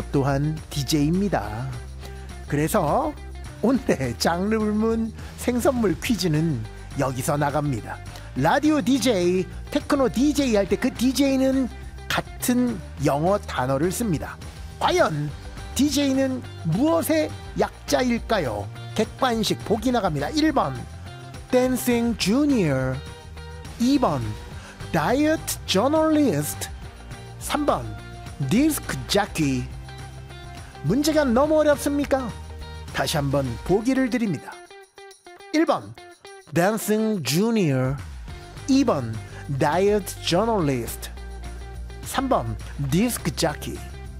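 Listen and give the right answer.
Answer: 3: 디스크 자키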